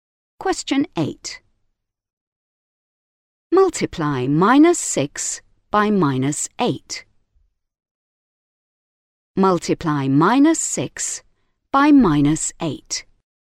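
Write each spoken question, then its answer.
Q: Multiply minus 6 by minus 8.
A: 48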